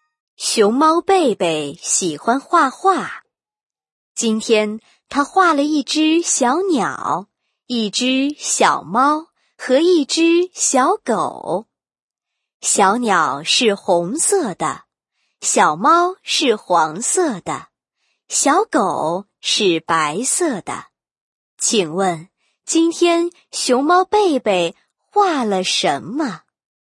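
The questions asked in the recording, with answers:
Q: 请问,今天熊猫贝贝画了什么?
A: 一只小鸟,一只小猫和一只小狗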